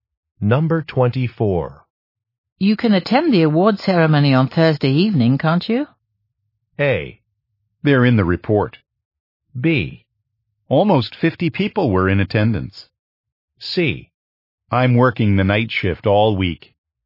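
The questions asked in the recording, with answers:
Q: You can attend the award ceremony on Thursday evening, can't you?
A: C: I'm working the night shift all week.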